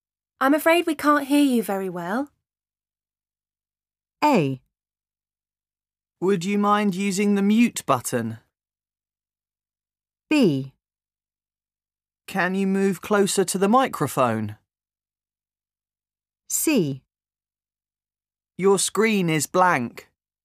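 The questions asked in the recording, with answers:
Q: I'm afraid we can't hear you very well.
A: B: Can you move closer to the microphone?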